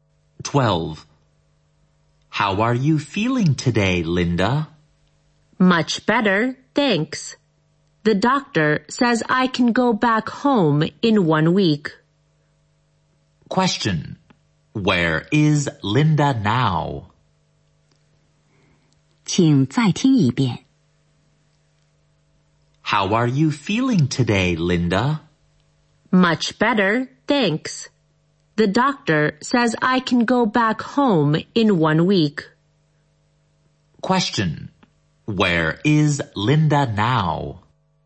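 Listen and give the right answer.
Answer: In hospital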